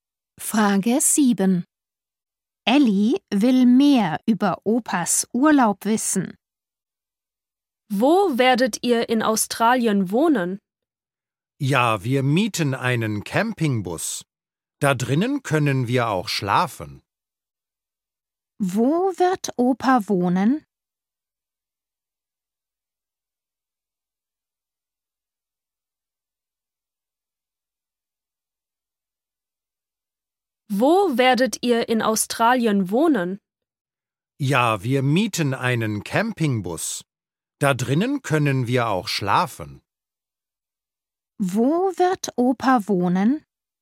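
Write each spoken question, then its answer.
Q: Wo wird Opa wohnen?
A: in einem Campingbus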